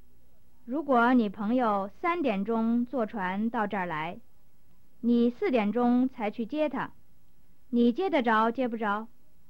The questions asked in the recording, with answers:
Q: 你接得着接不着?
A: 我想我接不着。